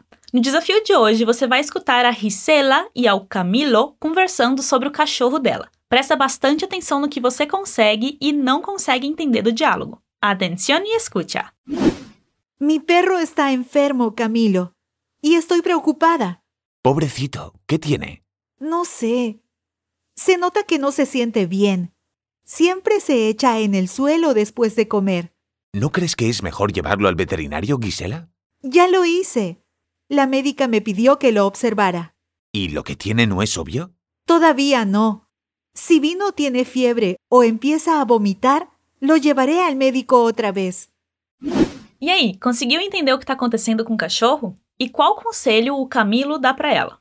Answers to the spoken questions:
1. Ou seja, que o cachorro dela tá doente e que ela tá preocupada.
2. Ou seja, você não acha que é melhor levar ele ao veterinário?